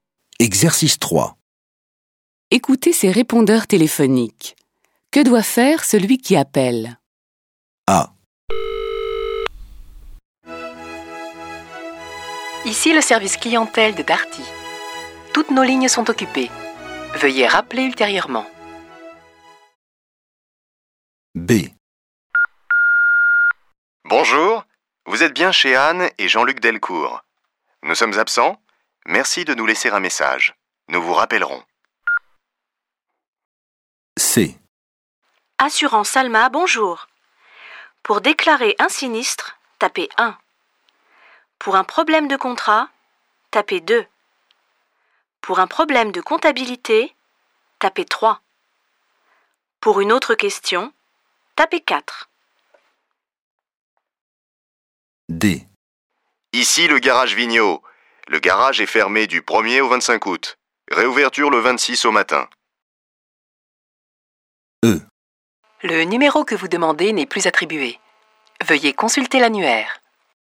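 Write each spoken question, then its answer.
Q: Que doit faire celui qui appelle ?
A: Rappeler plus tard

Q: Que doit faire celui qui appelle ?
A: Laisser un message

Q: Que doit faire celui qui appelle ?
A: Taper 1, 2, 3 ou 4 selon sa demande

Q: Que doit faire celui qui appelle ?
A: Consulter l'annuaire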